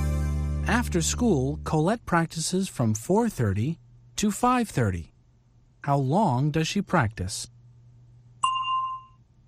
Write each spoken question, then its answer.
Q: How long does she practice?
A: For an hour. She practices for an hour.